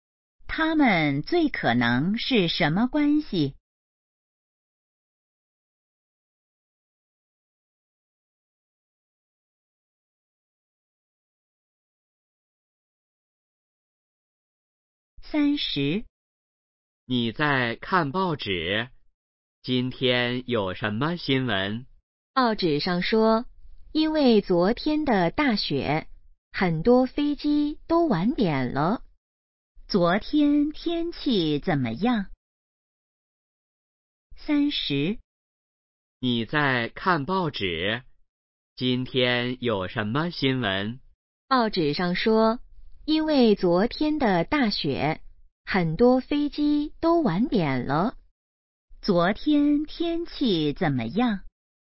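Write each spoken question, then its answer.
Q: 昨天天气怎么样?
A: 下大雪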